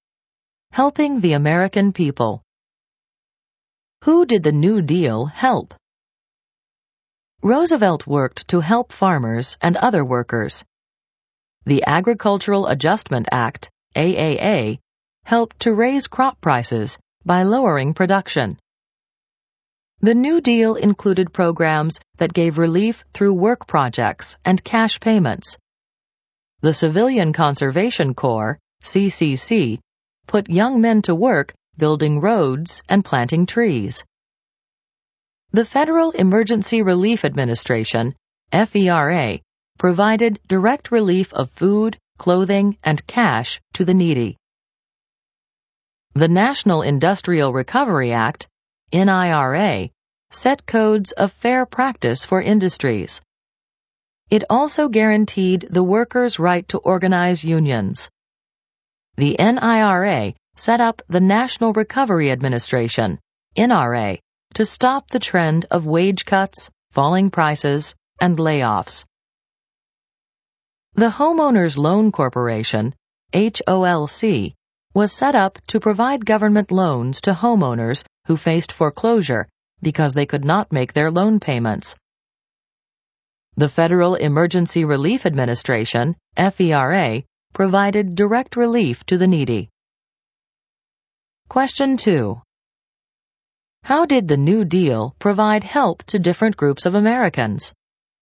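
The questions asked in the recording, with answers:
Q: How did the New Deal provide help to different groups of Americans?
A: Through work projects and cash payments for the needy (CCC, FERA), raising crop prices for farmers (AAA), fair codes and union rights for workers (NIRA), and loans to homeowners (HOLC)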